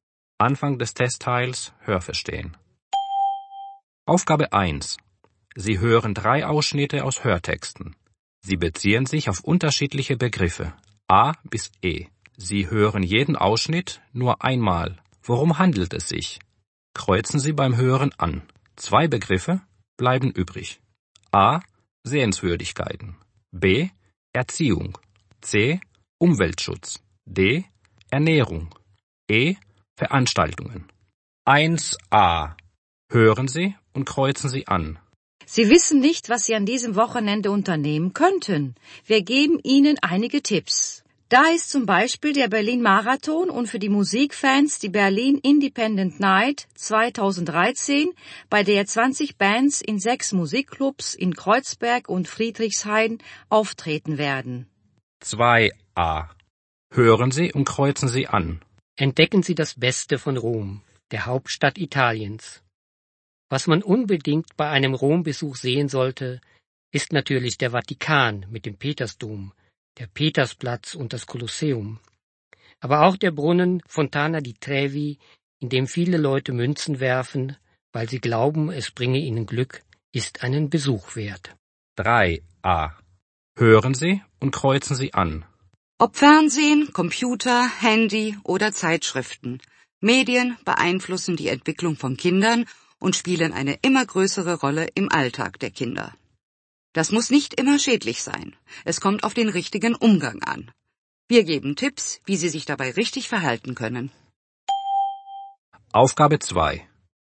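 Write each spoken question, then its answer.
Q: Worum handelt es sich?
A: E: Veranstaltungen

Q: Worum handelt es sich?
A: A: Sehenswürdigkeiten

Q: Worum handelt es sich?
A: B: Erziehung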